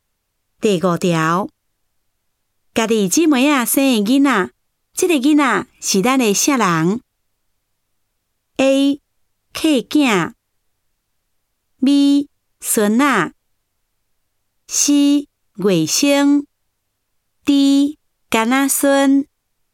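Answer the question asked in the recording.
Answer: C: 外甥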